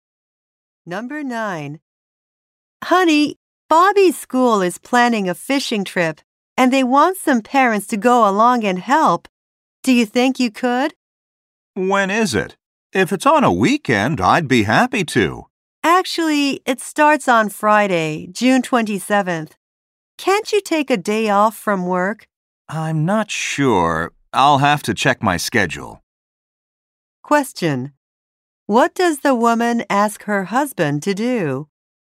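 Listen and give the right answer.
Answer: Help on the school fishing trip.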